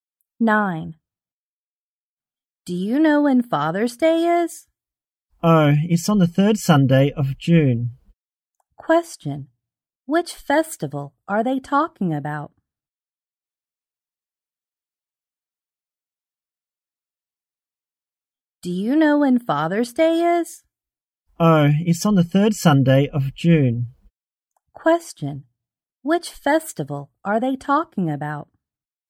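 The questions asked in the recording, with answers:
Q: Which festival are they talking about?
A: Father's Day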